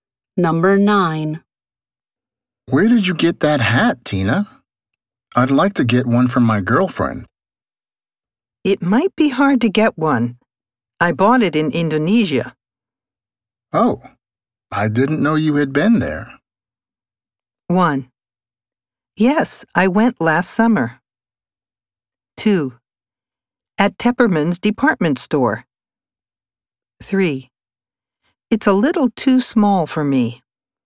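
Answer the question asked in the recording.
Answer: 1: Yes, I went last summer.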